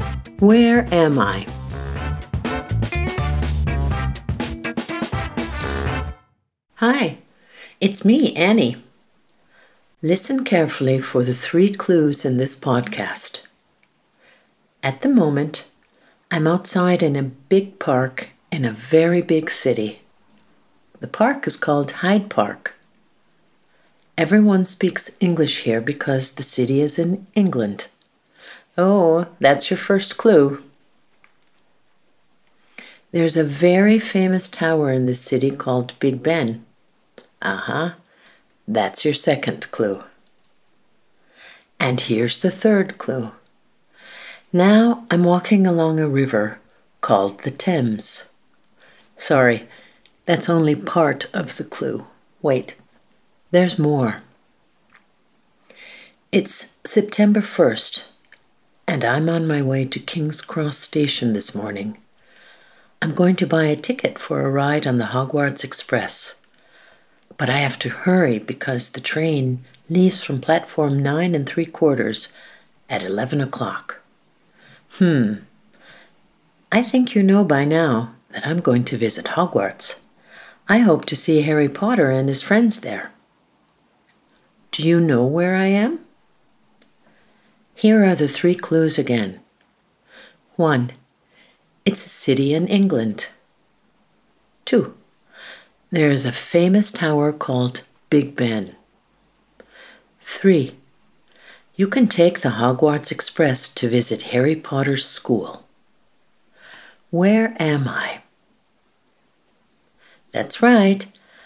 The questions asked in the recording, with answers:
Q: Where am I?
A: I'm in London.